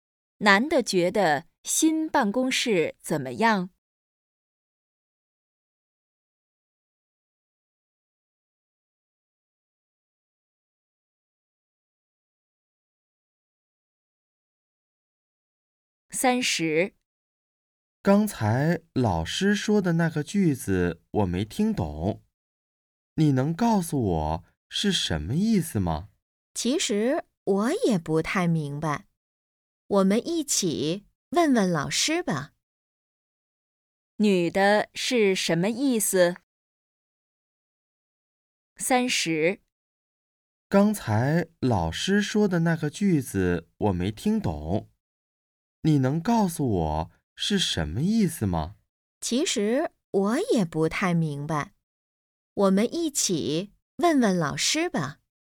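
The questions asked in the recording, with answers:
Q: 女的是什么意思?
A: 她也不明白,要一起问老师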